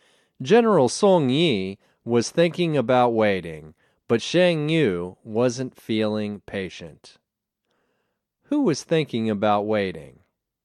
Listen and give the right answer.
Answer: General Song Yi was thinking about waiting.